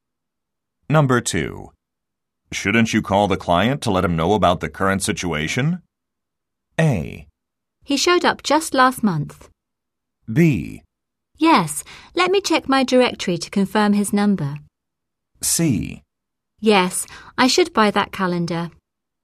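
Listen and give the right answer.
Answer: B: Yes, let me check my directory to confirm his number.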